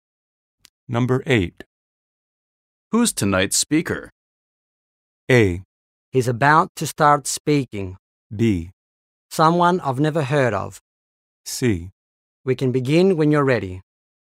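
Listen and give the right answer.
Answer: B: Someone I've never heard of.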